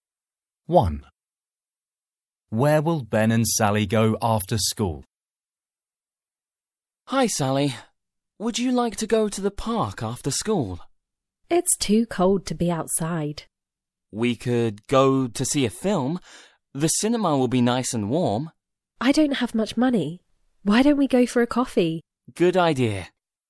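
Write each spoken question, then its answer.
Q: Where will Ben and Sally go after school?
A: For a coffee (to a café)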